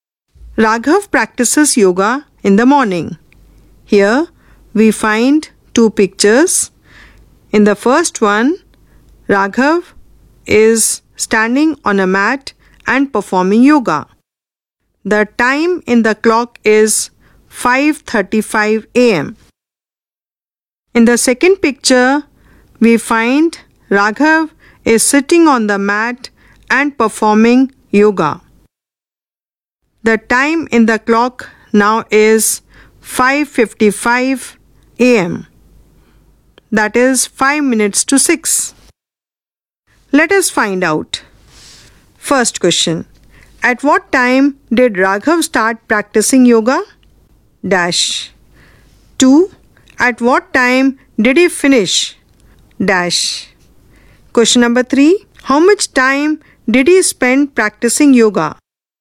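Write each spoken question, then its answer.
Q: At what time did Raghav start practicing yoga?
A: 5:35 AM

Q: At what time did he finish?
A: 5:55 AM

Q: How much time did he spend practicing yoga?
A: 20 minutes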